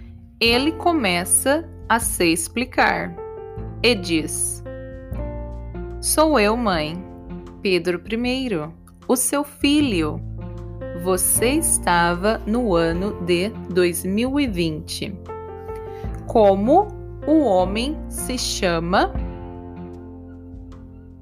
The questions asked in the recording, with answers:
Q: Como o homem se chama?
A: Pedro. O homem se chama Pedro.